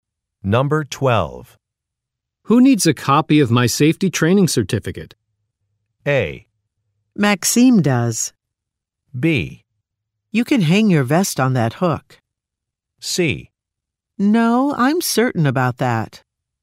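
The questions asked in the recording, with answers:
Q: Who needs a copy of my safety training certificate?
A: A: Maxime does.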